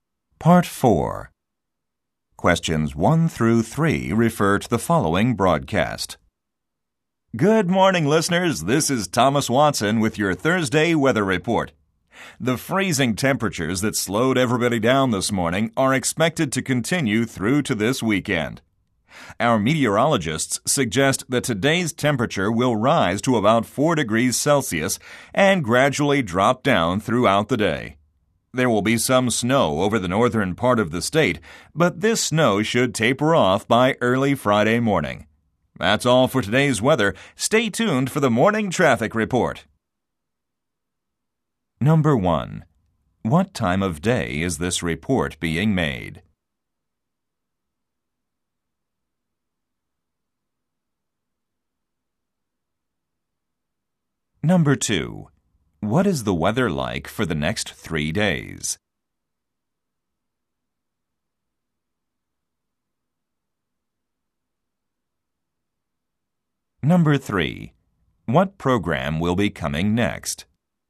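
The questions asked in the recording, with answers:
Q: What time of day is this report being made?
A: Morning

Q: What is the weather like for the next 3 days?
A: Freezing cold

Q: What program will be coming next?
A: The morning traffic report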